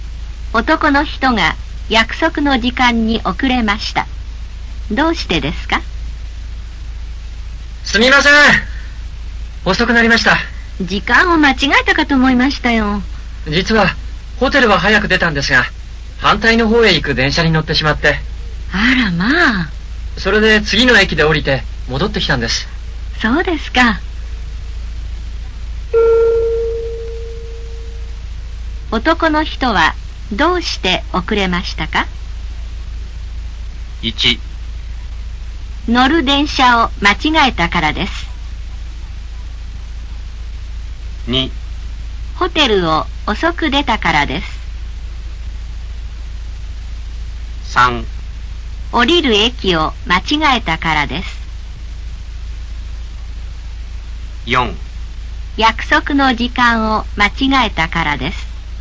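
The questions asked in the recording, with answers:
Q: 男の人はどうして遅れましたか?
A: 1: 乗る電車を間違えたからです。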